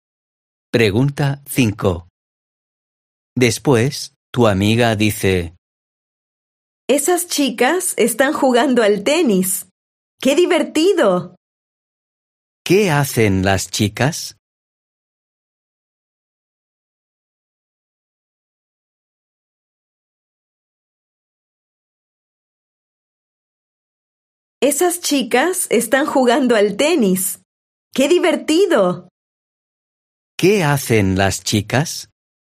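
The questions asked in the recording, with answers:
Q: ¿Qué hacen las chicas?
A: juegan al tenis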